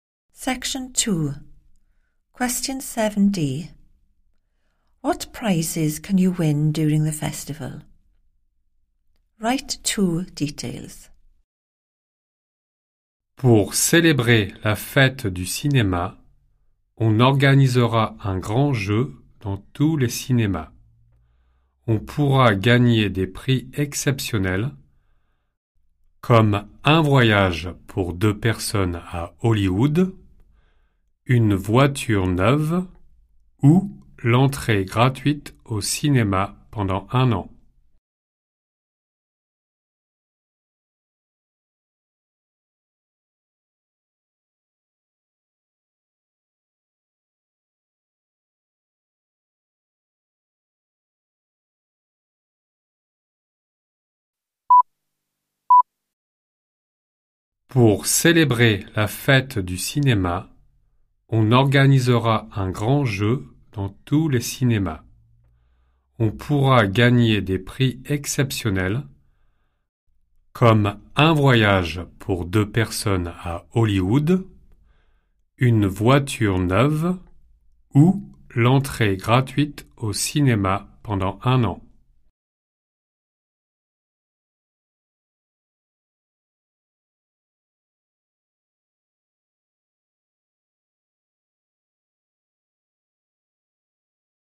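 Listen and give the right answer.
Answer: a trip for two to Hollywood, a new car, free cinema entry for a year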